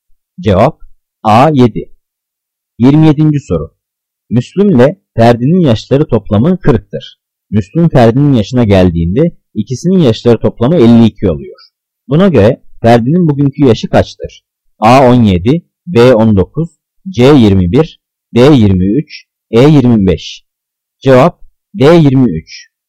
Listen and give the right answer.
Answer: Cevap D23.